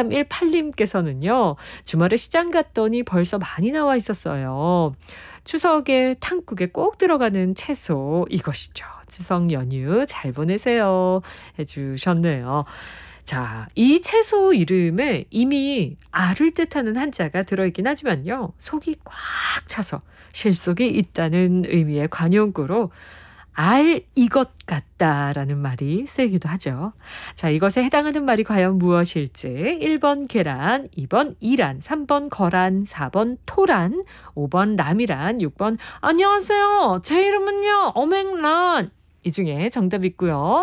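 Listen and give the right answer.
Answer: 4번: 토란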